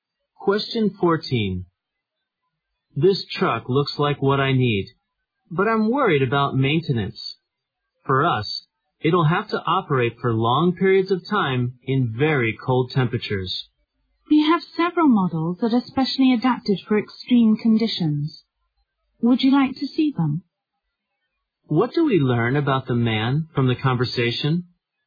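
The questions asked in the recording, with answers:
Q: What do we learn about the man from the conversation?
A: He needs a truck that can run long periods in very cold temperatures.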